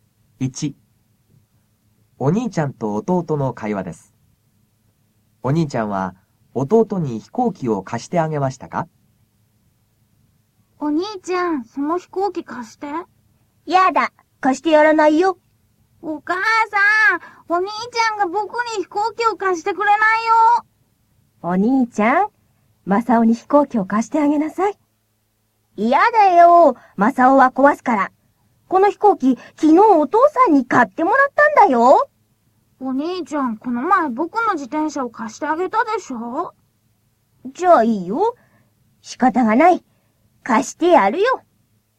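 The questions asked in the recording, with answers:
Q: お兄ちゃんは弟に飛行機を貸してあげましたか?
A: はい、貸してあげました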